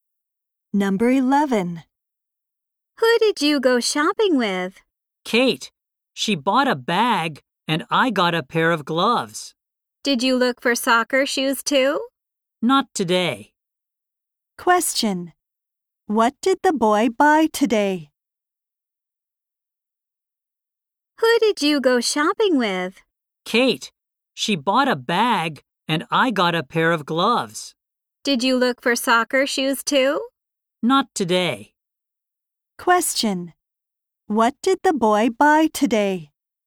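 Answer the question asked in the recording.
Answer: A pair of gloves.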